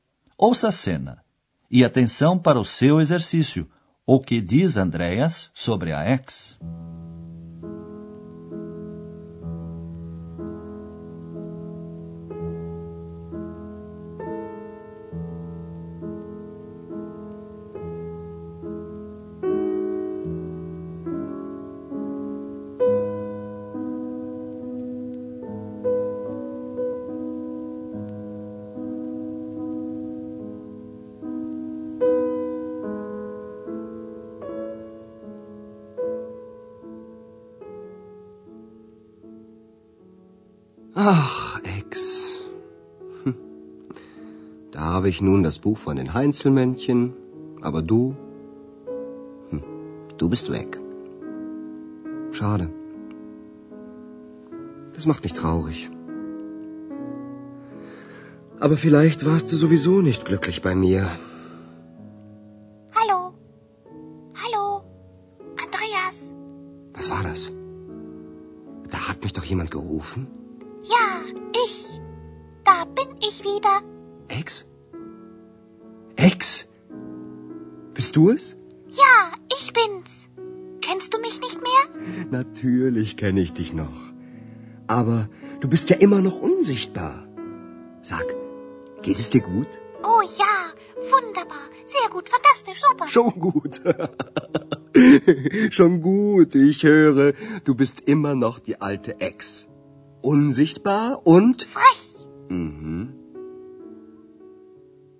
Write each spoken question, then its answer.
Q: o que diz Andreas sobre a ex.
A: Andreas constata que X continua a mesma de sempre.